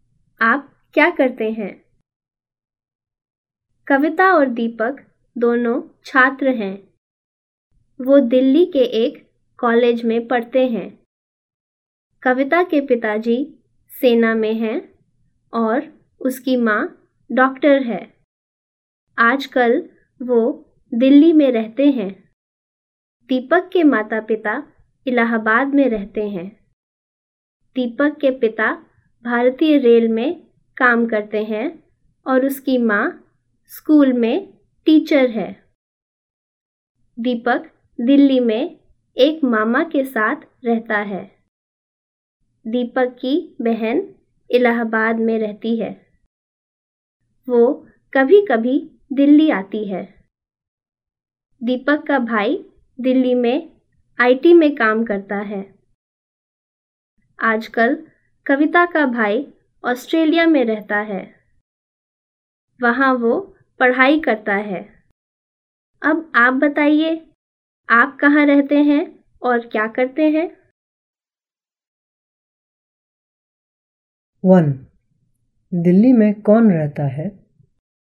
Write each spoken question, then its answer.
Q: दिल्ली में कौन रहता है?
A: दिल्ली में कविता, कविता के माँ बाप, दीपक, दीपक का भाई और दीपक के मामा मामी रहते हैं.